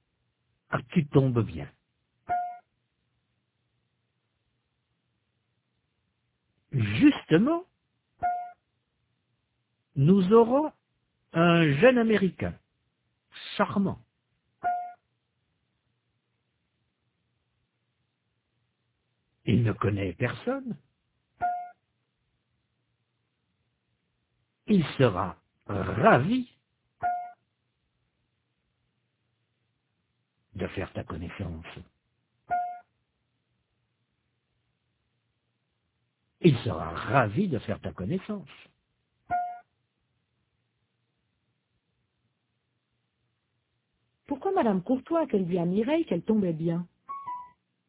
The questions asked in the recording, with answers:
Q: Pourquoi Madame Courtois a-t-elle dit à Mireille qu'elle tombait bien?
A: Parce que justement, ils auront un jeune Américain charmant.